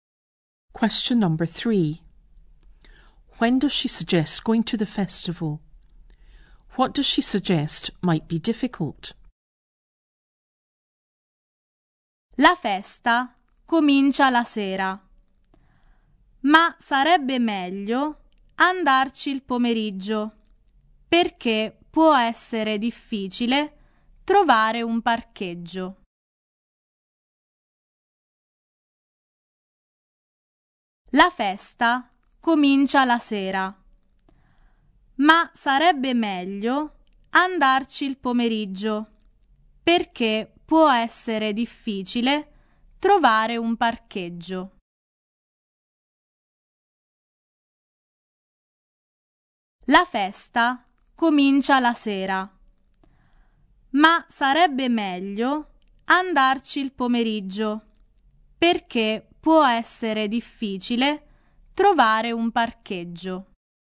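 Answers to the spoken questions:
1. In the afternoon
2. Finding a parking space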